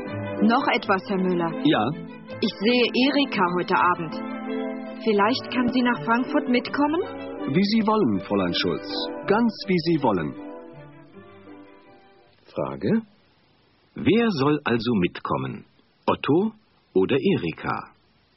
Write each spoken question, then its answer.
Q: Frage: Wer soll also mitkommen?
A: Erika soll mitkommen.